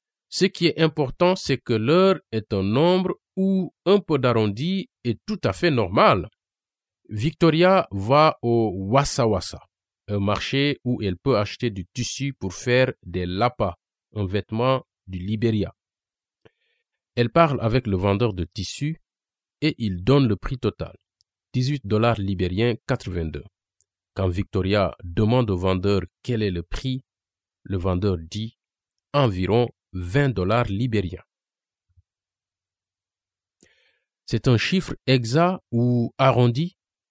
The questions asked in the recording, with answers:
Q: C'est un chiffre exact ou arrondi?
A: C'est un chiffre arrondi, car le vendeur dit « environ ».